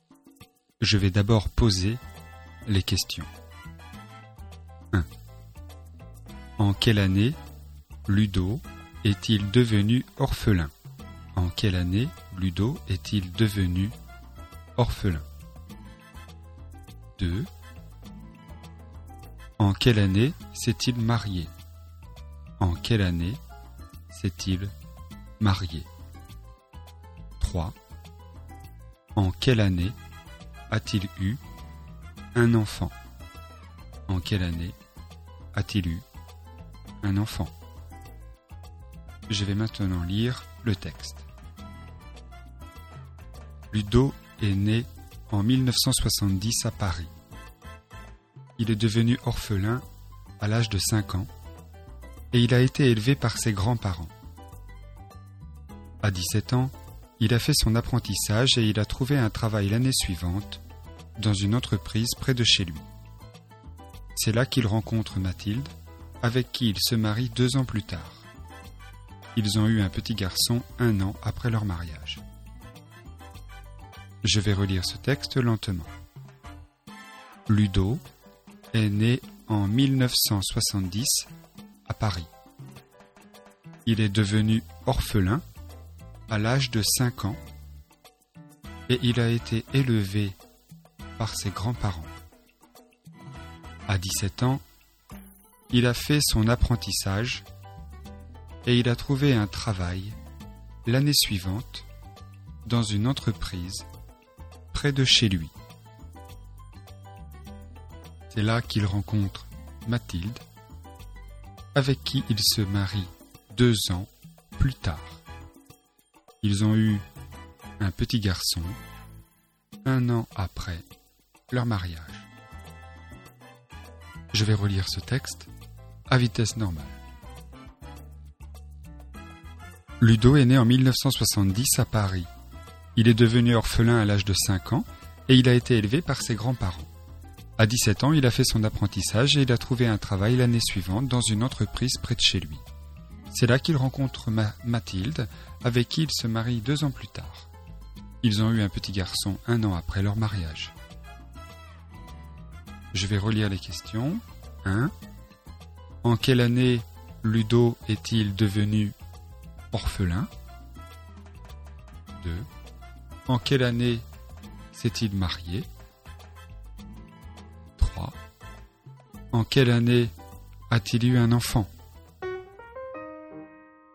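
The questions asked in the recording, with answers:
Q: En quelle année Ludo est-il devenu orphelin ?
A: En 1975

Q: En quelle année s'est-il marié ?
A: En 1990

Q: En quelle année a-t-il eu un enfant ?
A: En 1991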